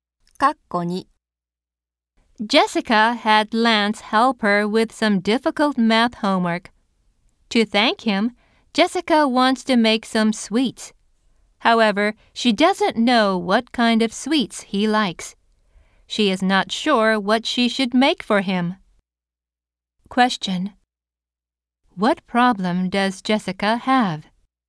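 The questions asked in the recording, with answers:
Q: What problem does Jessica have?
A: She doesn't know what kind of sweets Lance likes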